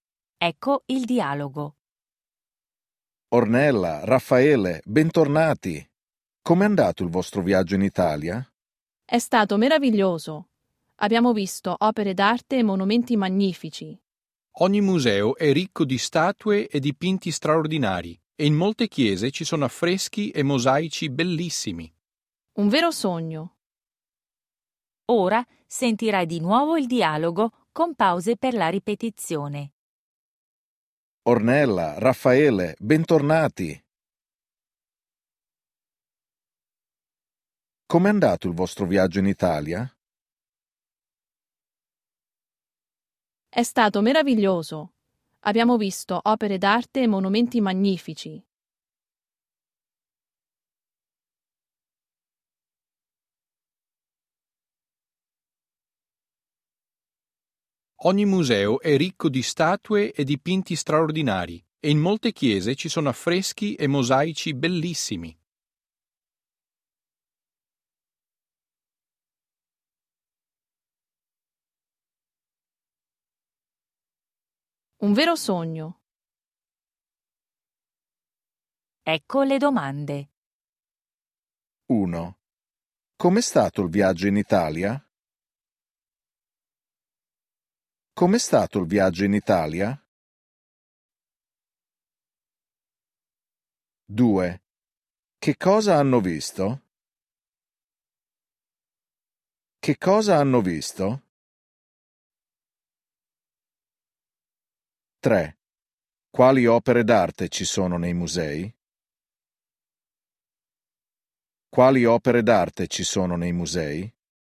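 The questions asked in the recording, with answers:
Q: Com'è stato il viaggio in Italia?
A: È stato meraviglioso.

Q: Che cosa hanno visto?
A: Opere d'arte e monumenti magnifici.

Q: Quali opere d'arte ci sono nei musei?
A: Statue e dipinti straordinari.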